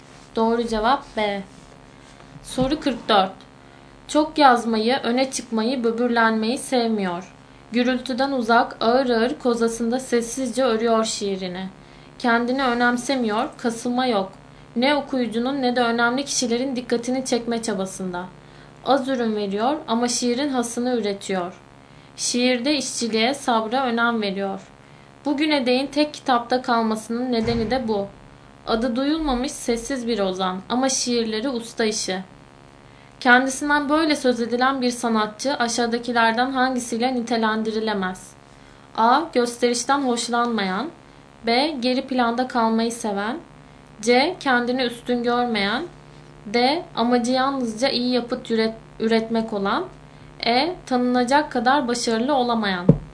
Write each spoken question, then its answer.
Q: Kendisinden böyle söz edilen bir sanatçı aşağıdakilerden hangisiyle nitelendirilemez?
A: Doğru cevap E.